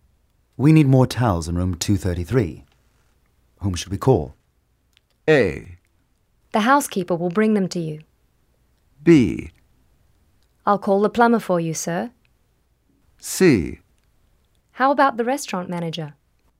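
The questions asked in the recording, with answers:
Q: We need more towels in room 233. Whom should we call?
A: A: The housekeeper will bring them to you.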